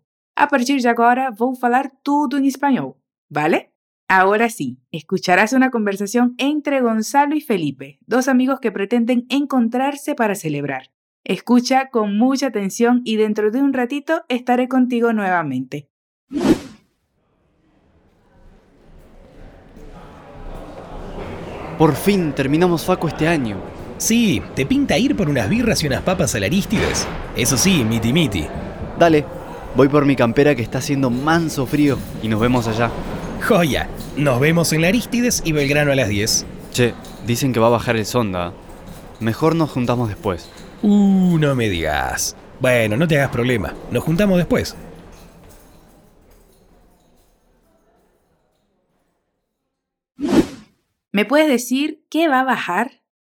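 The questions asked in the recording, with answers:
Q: ¿Me puedes decir qué va a bajar?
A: El zonda (un viento fuerte, cálido y seco)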